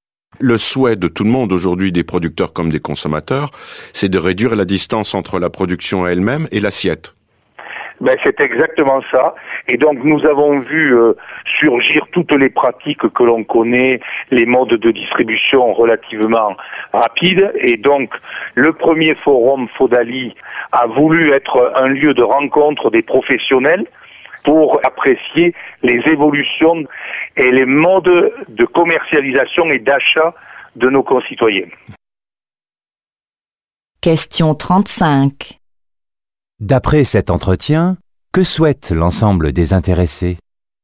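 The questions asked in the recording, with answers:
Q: D'après cet entretien, que souhaite l'ensemble des intéressés ?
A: Réduire la distance entre la production et l'assiette.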